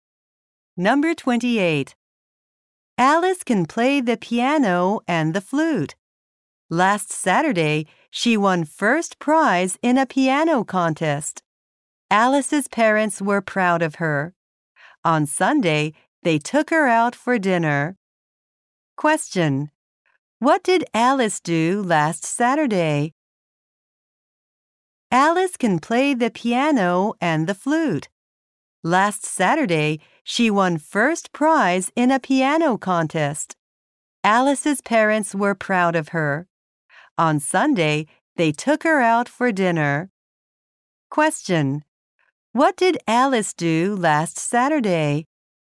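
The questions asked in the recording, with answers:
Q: What did Alice do last Saturday?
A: She won first prize in a piano contest.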